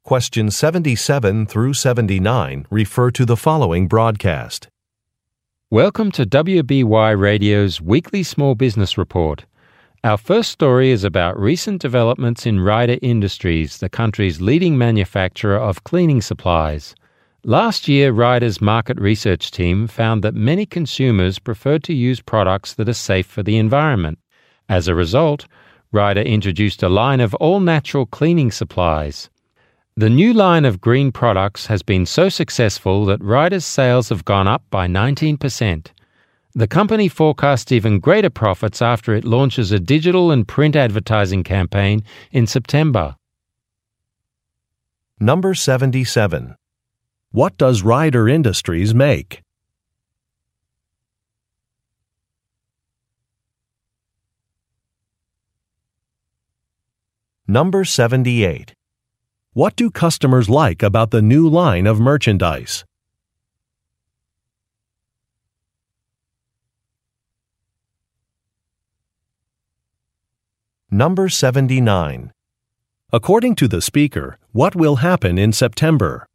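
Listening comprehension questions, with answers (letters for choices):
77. What does Rider Industries make?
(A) Kitchen appliances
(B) Electric vehicles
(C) Gardening supplies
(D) Cleaning products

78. What do customers like about the new line of merchandise?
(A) It is environmentally friendly.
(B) It is reasonably priced.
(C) It has attractive packaging.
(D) It comes in a variety of sizes.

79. According to the speaker, what will happen in September?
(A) A live radio interview will be held.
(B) An advertising campaign will be launched.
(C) An international trade show will take place.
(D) A company-wide training program will begin.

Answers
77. D
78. A
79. B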